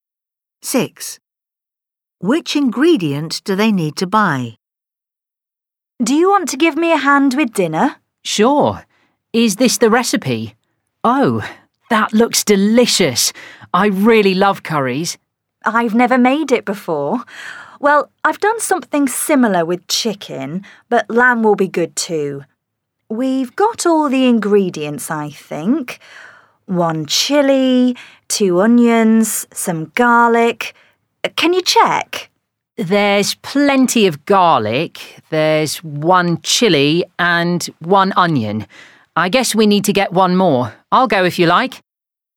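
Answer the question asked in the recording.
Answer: an onion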